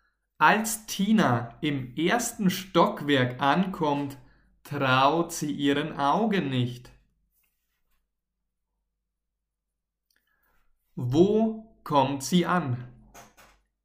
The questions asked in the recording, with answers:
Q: Wo kommt sie an?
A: Im ersten Stockwerk. Tina kommt im ersten Stockwerk an.